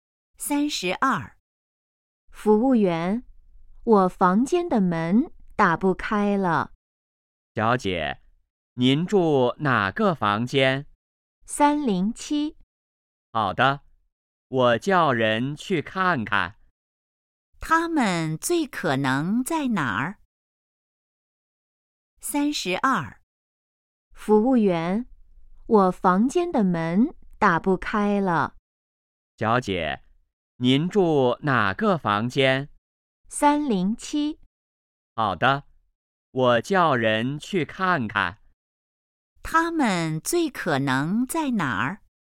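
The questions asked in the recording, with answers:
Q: 他们最可能在哪儿?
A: 宾馆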